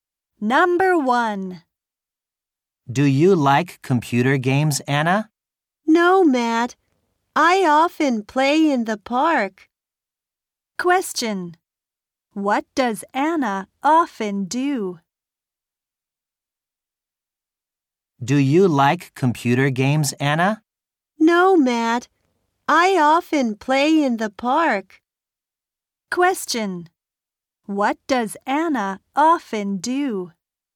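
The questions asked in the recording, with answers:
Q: What does Anna often do?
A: She plays in the park.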